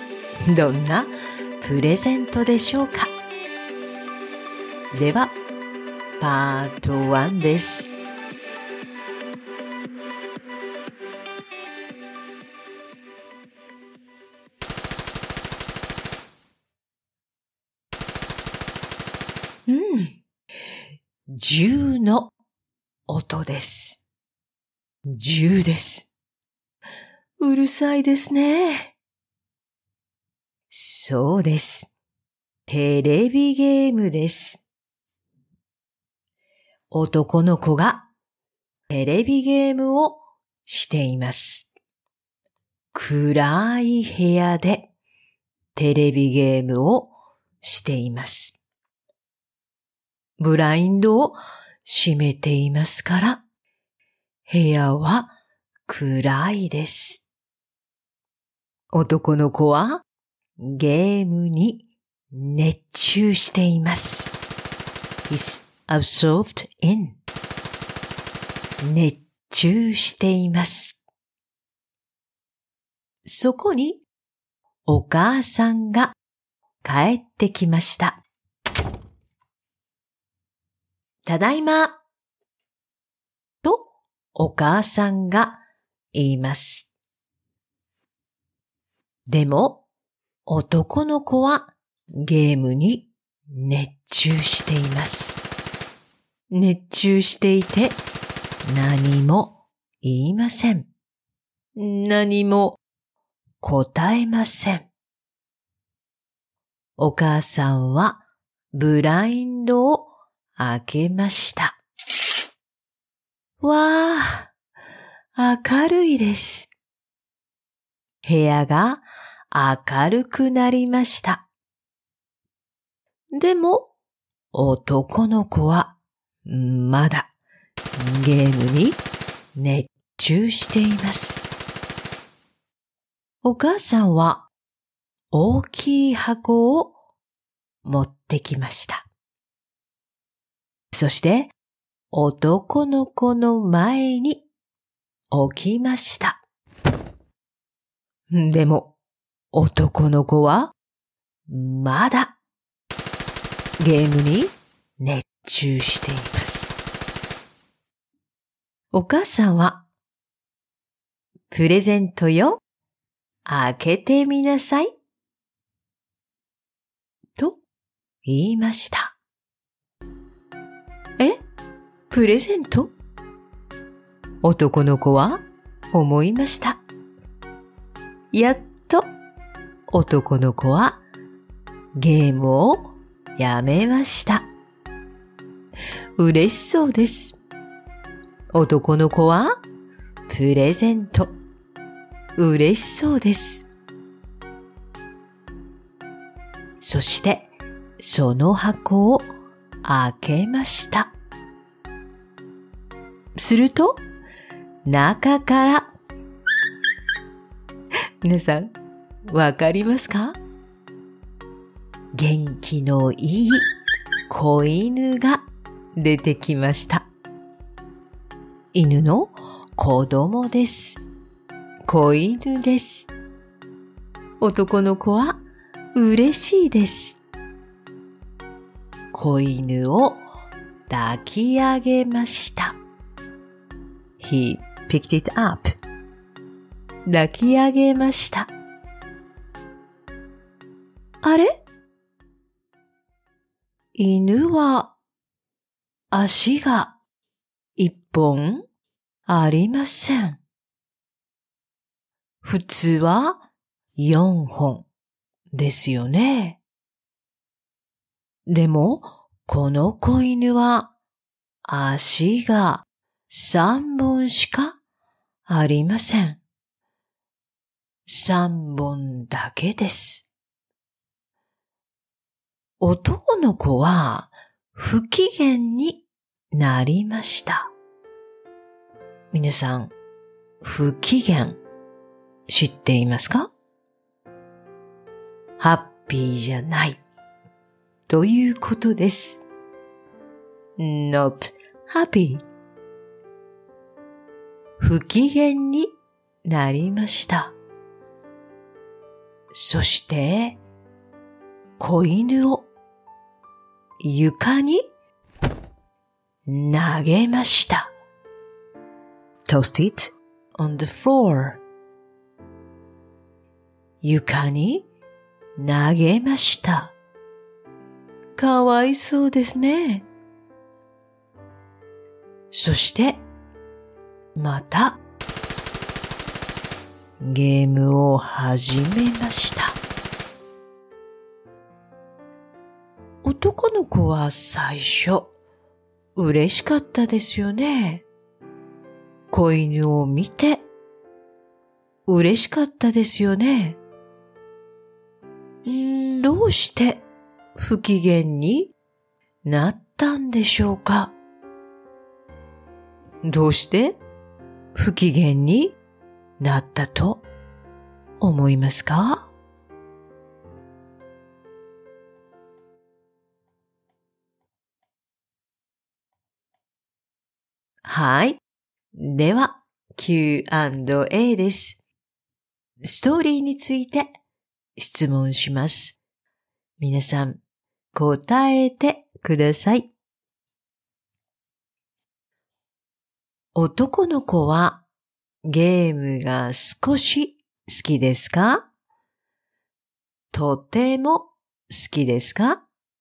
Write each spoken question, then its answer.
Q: 男の子はゲームが少し好きですか?とても好きですか?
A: とても好きです。男の子はゲームがとても好きです。